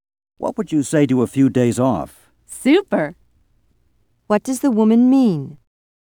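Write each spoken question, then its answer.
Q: What does the woman mean?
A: She would love to have a few days off.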